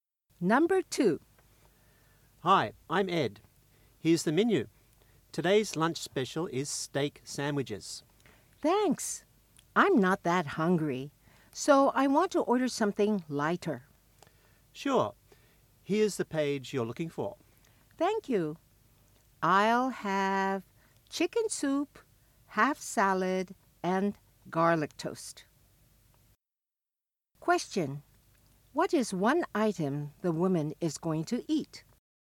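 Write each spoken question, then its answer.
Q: What is one item the woman is going to eat?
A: Chicken soup (or half salad, or garlic toast)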